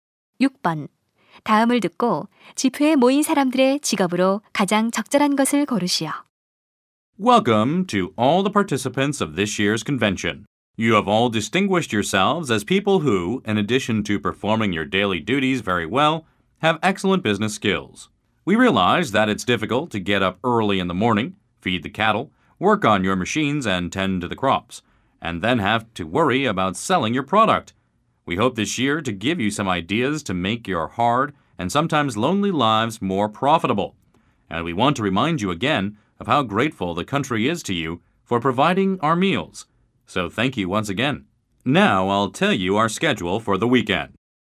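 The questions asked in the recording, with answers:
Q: 다음을 듣고 집회에 모인 사람들의 직업으로 가장 적절한 것을 고르시오.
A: 농부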